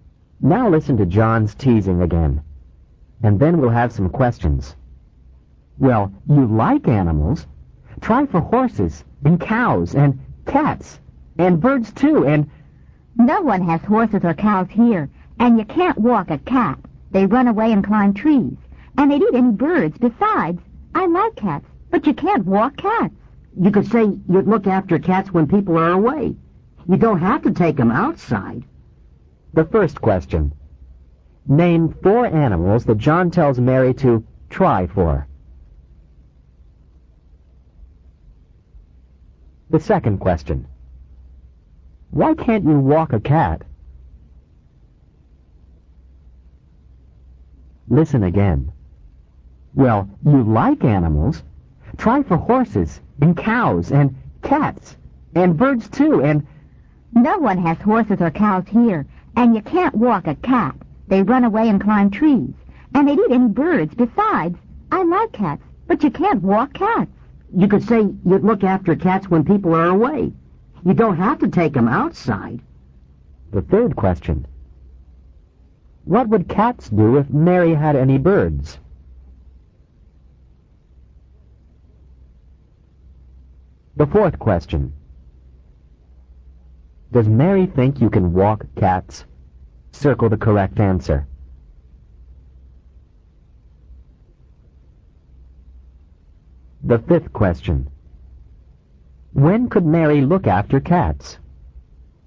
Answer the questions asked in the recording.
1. First, the answer is horses, H-O-R-S-E-S, cows, C-O-W-S, cats, C-A-T-S, and birds, B-I-R-D-S.
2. Second, the answer is, they run away and climb, C-L-I-M-B, trees.
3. Third, the cats would eat, E-A-T, them.
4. No, she doesn't think you can.
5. Fifth, when people are away.